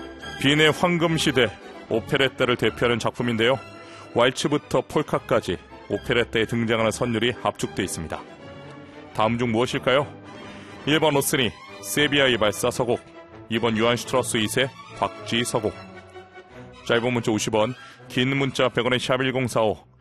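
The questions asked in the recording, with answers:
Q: 다음 중 무엇일까요?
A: 2: 요한 슈트라우스 2세, 박쥐 서곡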